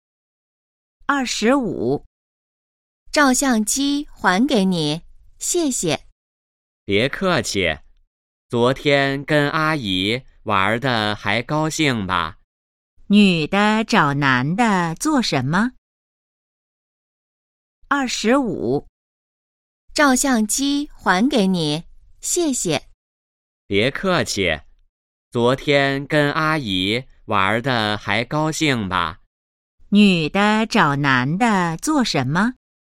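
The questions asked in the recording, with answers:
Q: 女的找男的做什么?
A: 还照相机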